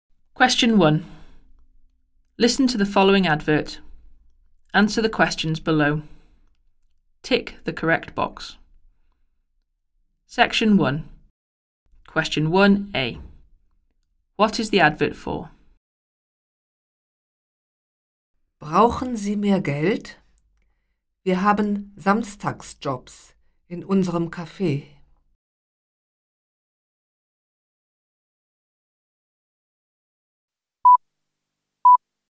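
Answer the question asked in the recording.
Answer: Saturday jobs in a café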